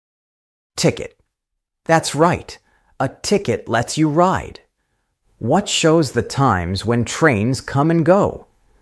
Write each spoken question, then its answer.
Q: What shows the times when trains come and go?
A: Train schedule. Perfect. The schedule shows the times.